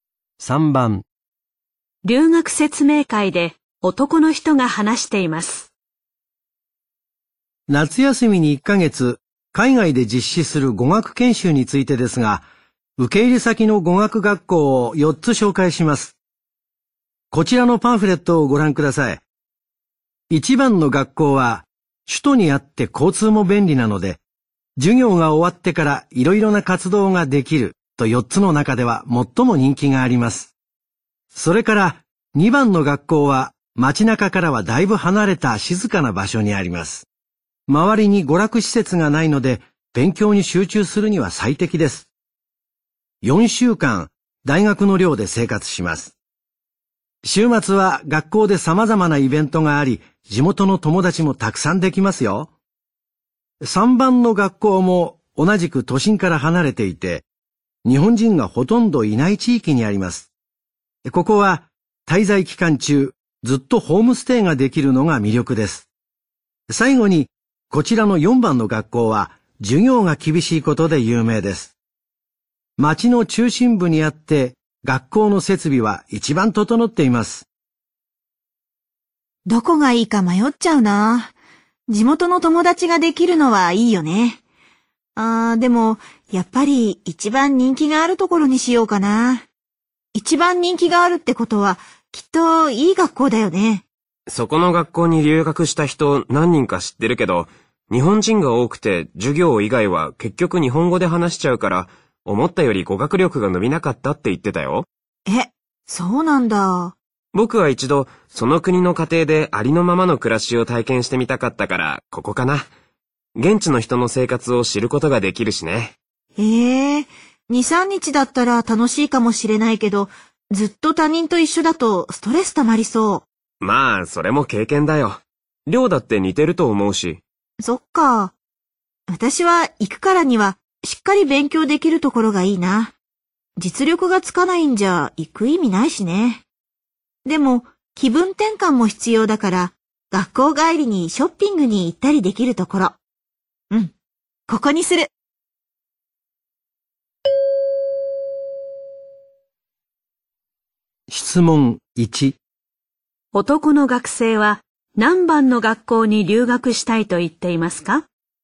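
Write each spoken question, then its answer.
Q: 男の学生は何番の学校に留学したいと言っていますか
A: 3番の学校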